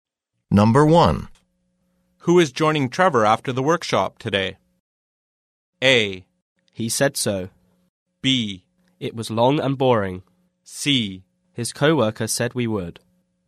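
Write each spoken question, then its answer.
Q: Who is joining Trevor after the workshop today?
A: C: His co-worker said we would.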